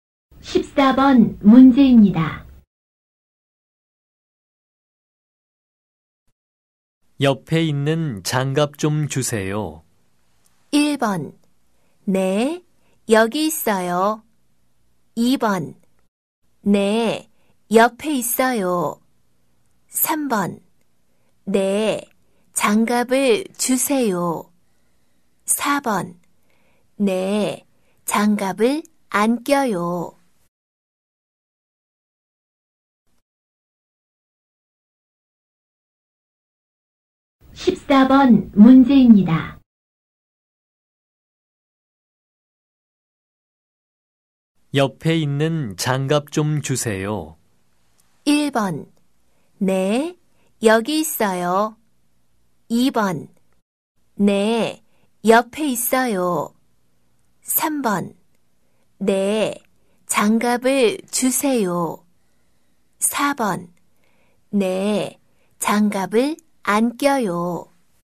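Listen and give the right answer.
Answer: 1: 네, 여기 있어요.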